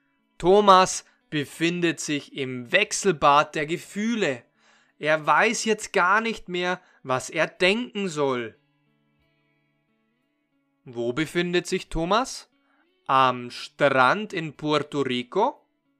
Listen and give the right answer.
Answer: Nein, Thomas befindet sich nicht am Strand in Puerto Rico.